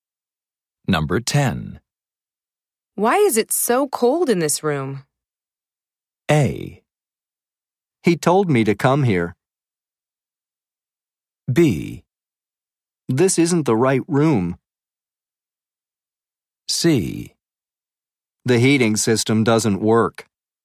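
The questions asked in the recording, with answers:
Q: Why is it so cold in this room?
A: C: The heating system doesn't work.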